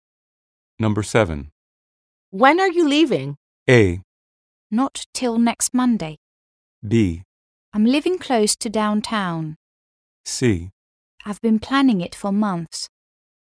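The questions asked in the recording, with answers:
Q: When are you leaving?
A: A: Not till next Monday.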